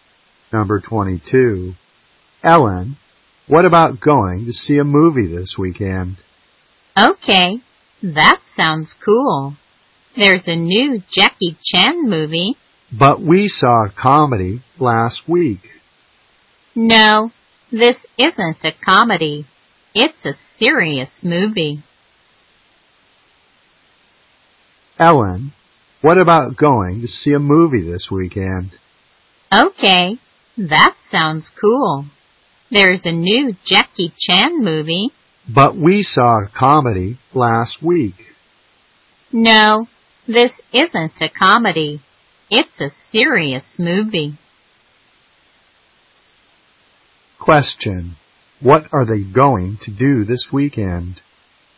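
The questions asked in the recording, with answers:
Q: What are they going to do this weekend?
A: See a movie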